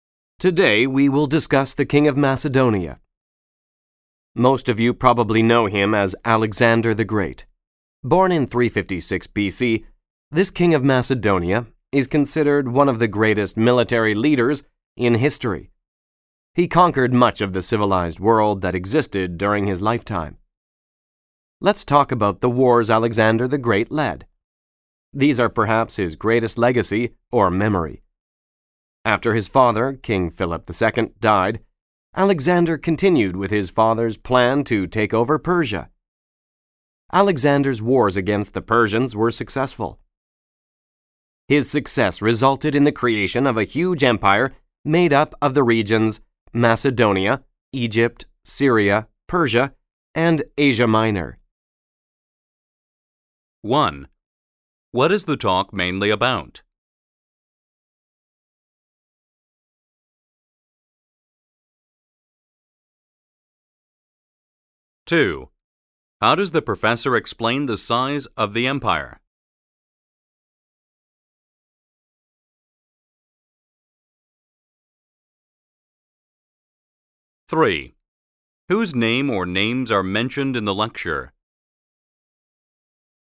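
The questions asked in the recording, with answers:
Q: What is the talk mainly about?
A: Alexander the Great and the wars he led

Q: How does the professor explain the size of the empire?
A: By listing the regions it included: Macedonia, Egypt, Syria, Persia and Asia Minor

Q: Whose name or names are mentioned in the lecture?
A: Alexander the Great and his father, King Philip II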